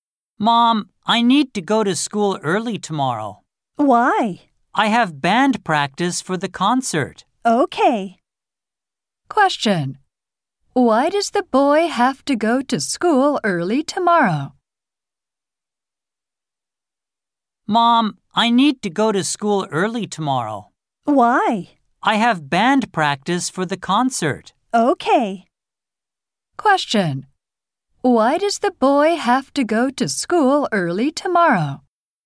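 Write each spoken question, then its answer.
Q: Why does the boy have to go to school early tomorrow?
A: He has band practice for the concert.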